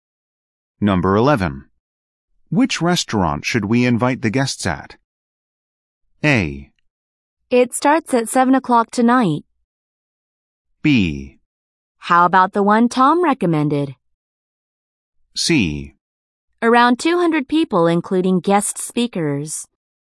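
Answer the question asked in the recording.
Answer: B: How about the one Tom recommended?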